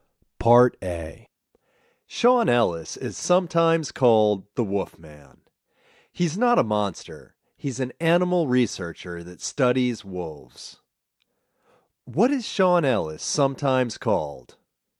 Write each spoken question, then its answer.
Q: What is Sean Ellis sometimes called?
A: Sean Ellis is sometimes called the Wolfman.